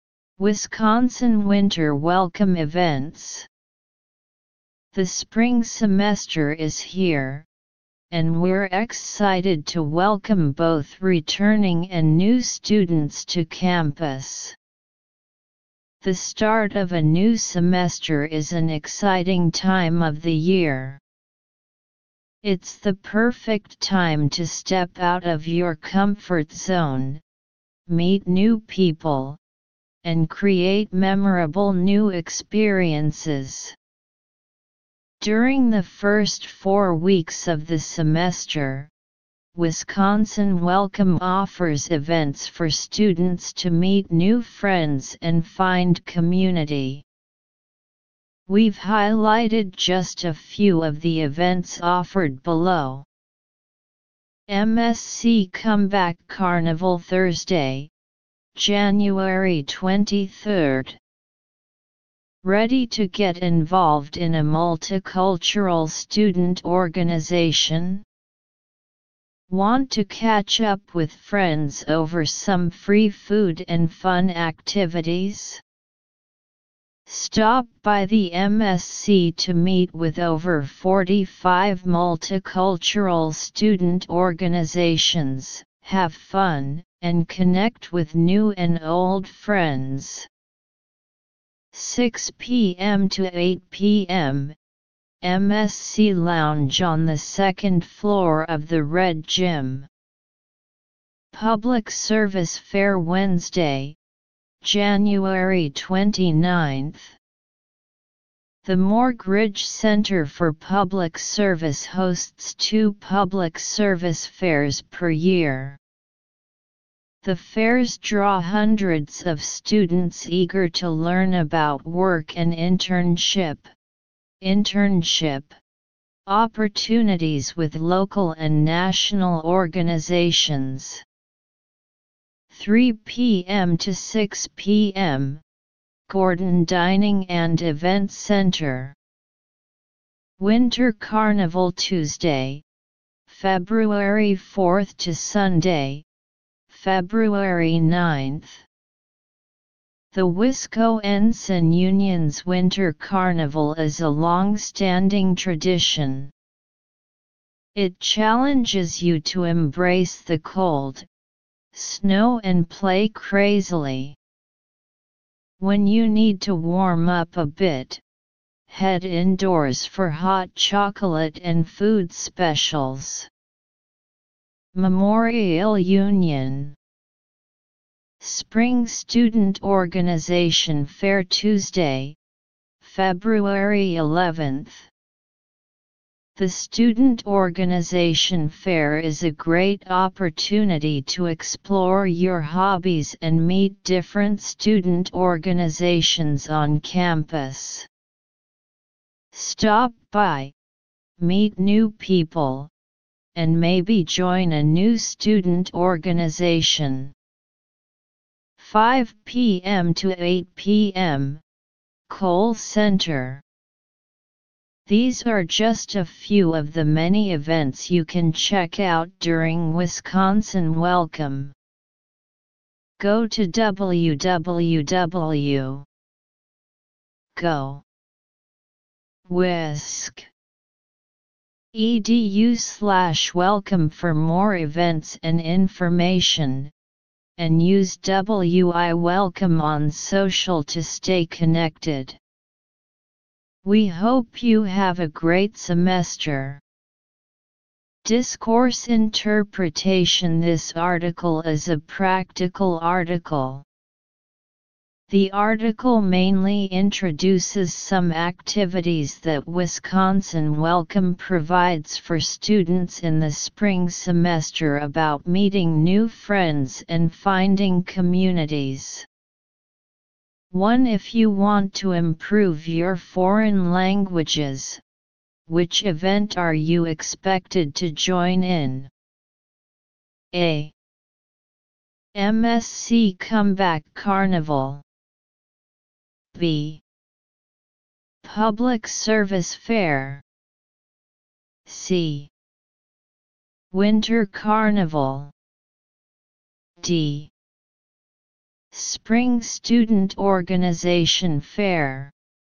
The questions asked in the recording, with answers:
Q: If you want to improve your foreign languages, which event are you expected to join in?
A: So choose A. Answer, A.